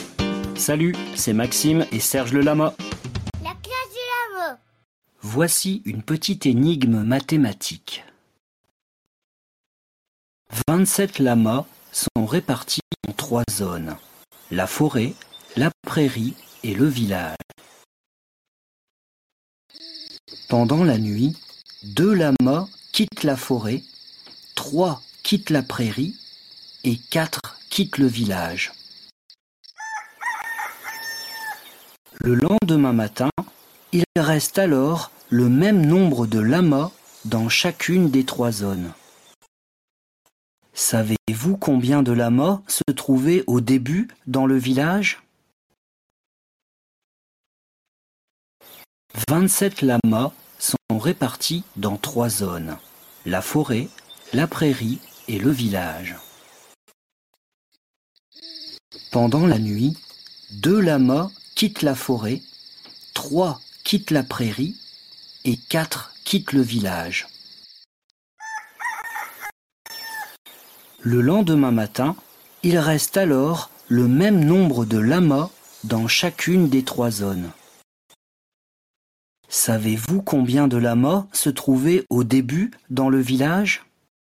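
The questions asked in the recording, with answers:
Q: Savez-vous combien de lamas se trouvaient au début dans le village ?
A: 10 lamas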